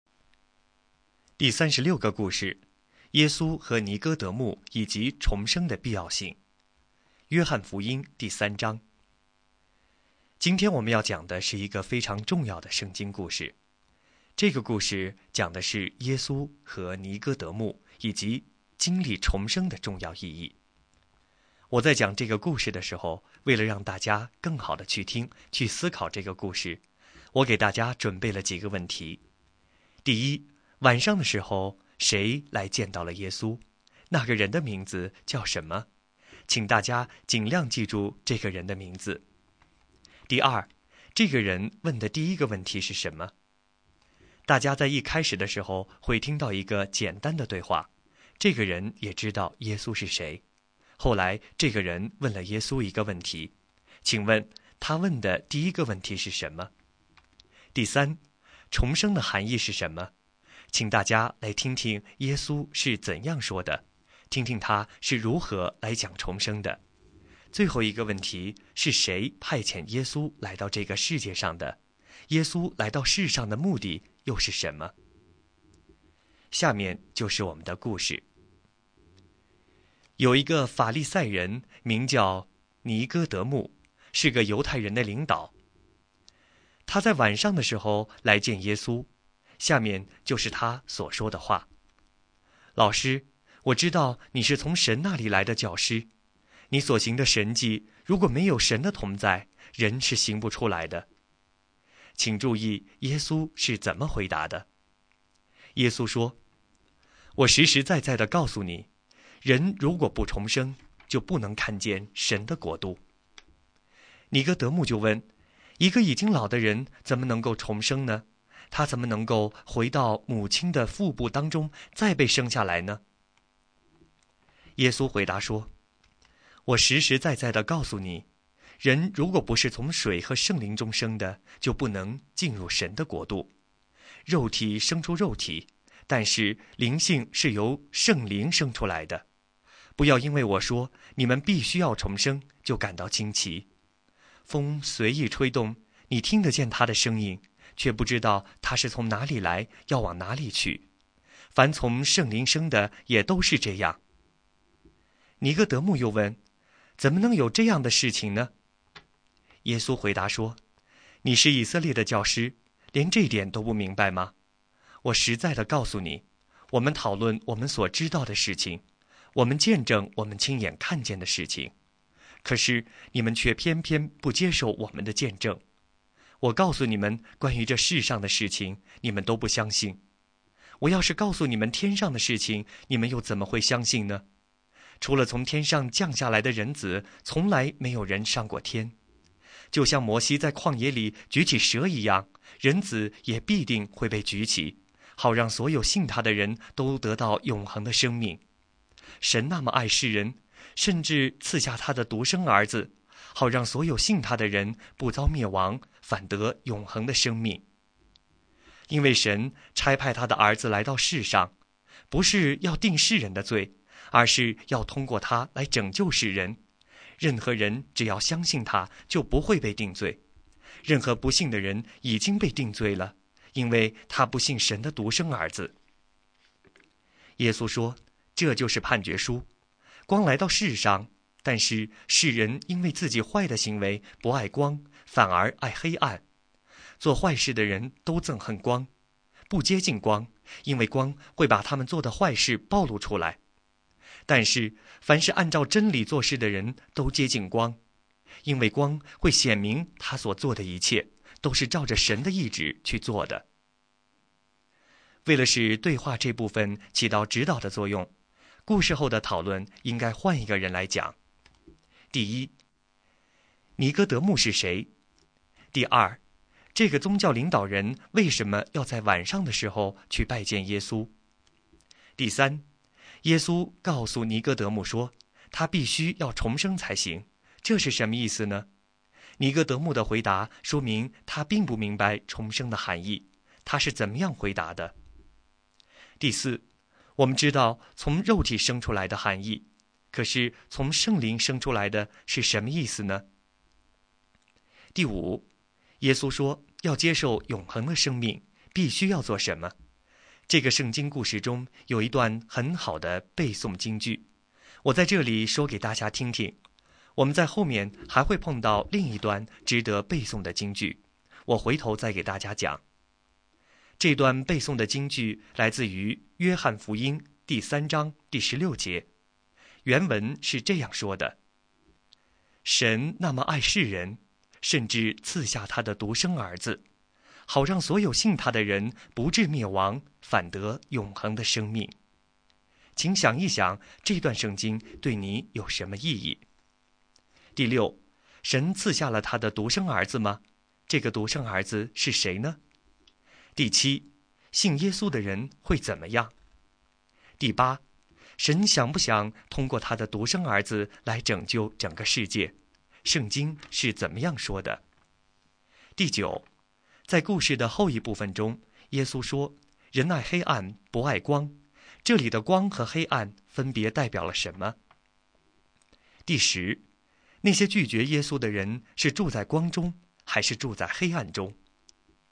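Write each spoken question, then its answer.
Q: 晚上的时候,谁来见到了耶稣?那个人的名字叫什么?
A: 尼哥德慕,一个法利赛人

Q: 这个人问的第一个问题是什么?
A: 一个已经老的人怎么能够重生呢?

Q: 是谁派遣耶稣来到这个世界上的?耶稣来到世上的目的又是什么?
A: 神派遣的;为了拯救世人

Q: 尼哥德慕是谁?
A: 一个法利赛人,犹太人的领导

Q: 尼哥德慕的回答说明他并不明白重生的含义,他是怎么样回答的?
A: 一个已经老的人怎么能够重生呢?怎么能回到母亲腹中再被生下来呢?

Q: 耶稣说要接受永恒的生命,必须要做什么?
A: 信神的独生儿子(耶稣)

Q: 神赐下了他的独生儿子吗?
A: 赐下了

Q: 这个独生儿子是谁呢?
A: 耶稣

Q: 信耶稣的人会怎么样?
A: 不至灭亡,得永恒的生命,不被定罪

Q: 那些拒绝耶稣的人是住在光中,还是住在黑暗中?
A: 住在黑暗中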